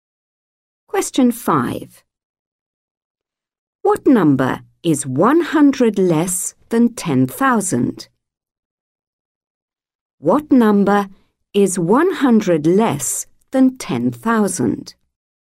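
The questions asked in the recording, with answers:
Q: What number is 100 less than 10,000?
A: 9,900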